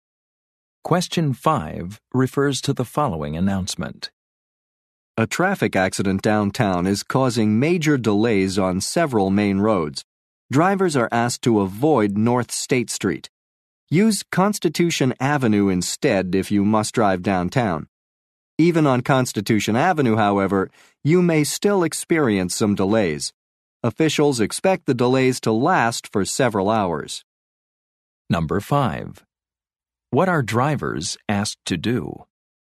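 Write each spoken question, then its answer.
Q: What are drivers asked to do?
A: Avoid North State Street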